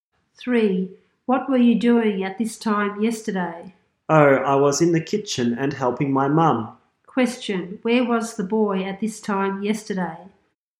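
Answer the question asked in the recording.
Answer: In the kitchen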